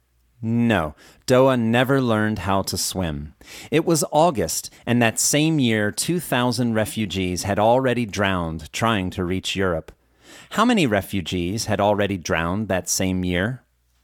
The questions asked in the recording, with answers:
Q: How many refugees had already drowned that same year?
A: 2,000 refugees had already drowned that same year.